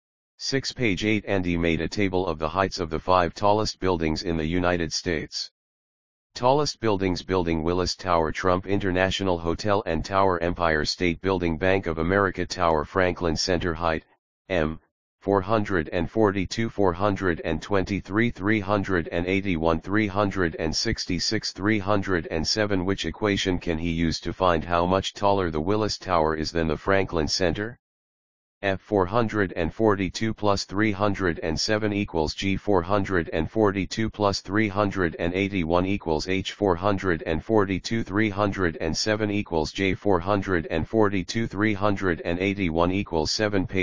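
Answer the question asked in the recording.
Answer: H: 442 - 307 =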